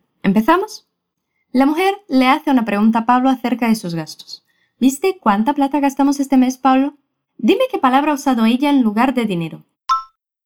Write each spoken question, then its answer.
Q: Dime qué palabra ha usado ella en lugar de dinero.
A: Plata. Ha dicho plata.